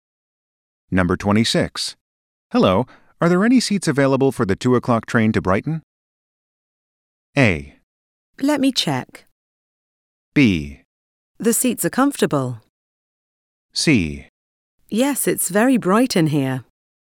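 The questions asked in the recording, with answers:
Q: Hello, are there any seats available for the 2 o'clock train to Brighton?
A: A: Let me check.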